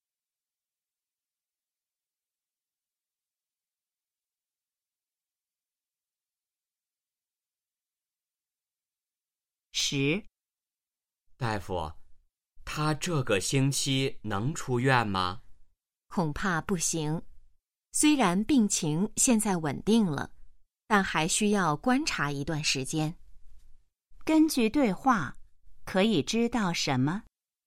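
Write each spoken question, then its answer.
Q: 根据对话,可以知道什么?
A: 病人这个星期还不能出院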